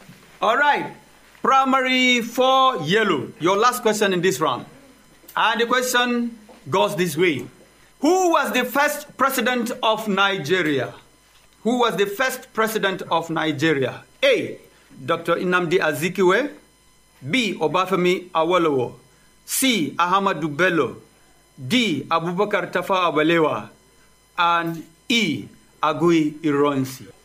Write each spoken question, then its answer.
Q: Who was the first president of Nigeria?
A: Is A. Dr. Nnamdi Azikiwe.